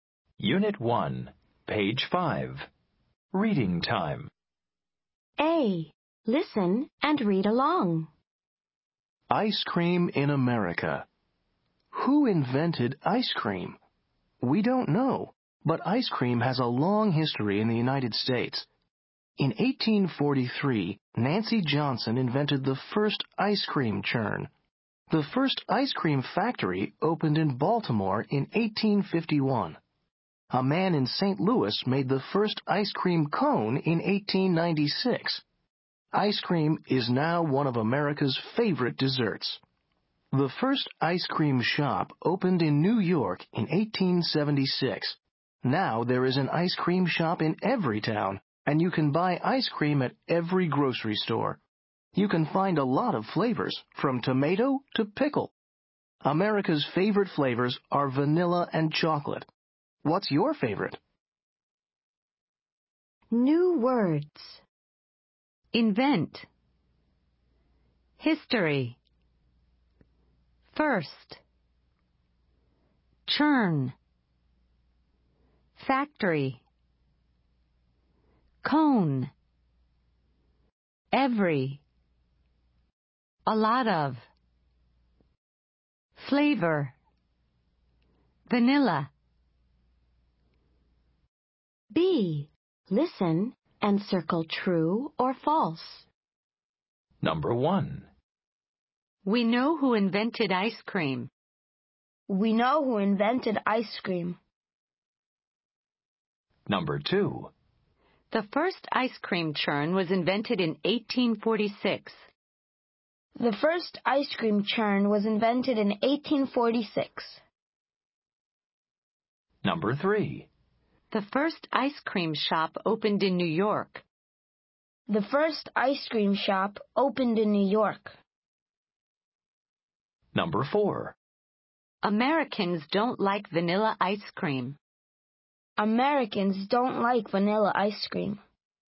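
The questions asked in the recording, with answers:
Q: We know who invented ice cream.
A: False

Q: The first ice cream churn was invented in 1846.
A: False

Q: The first ice cream shop opened in New York.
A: True

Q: Americans don't like vanilla ice cream.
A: False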